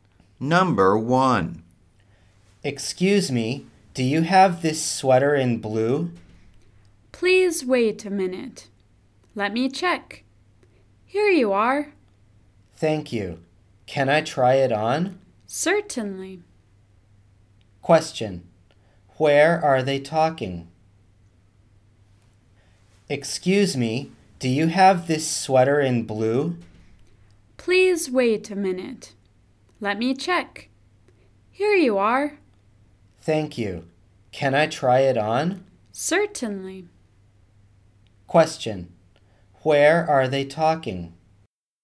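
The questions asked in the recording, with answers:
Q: Where are they talking?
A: At a clothes store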